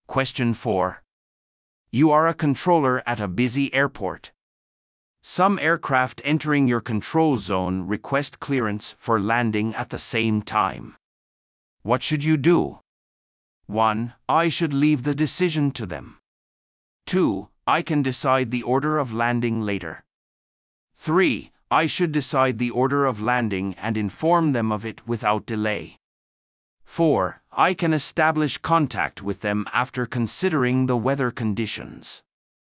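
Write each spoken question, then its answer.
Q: What should you do?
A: 3: I should decide the order of landing and inform them of it without delay.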